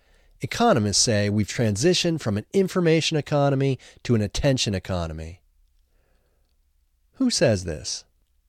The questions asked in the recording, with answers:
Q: Who says this?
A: Economists say this.